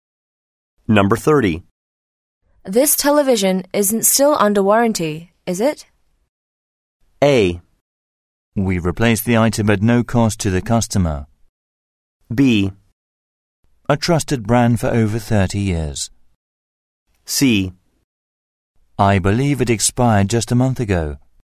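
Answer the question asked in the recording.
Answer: C: I believe it expired just a month ago.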